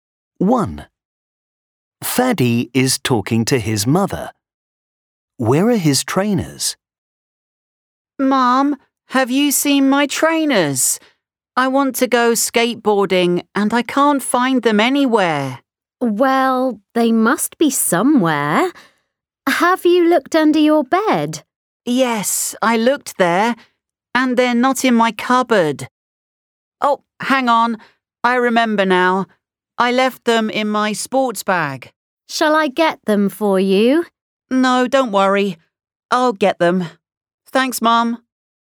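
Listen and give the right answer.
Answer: in his sports bag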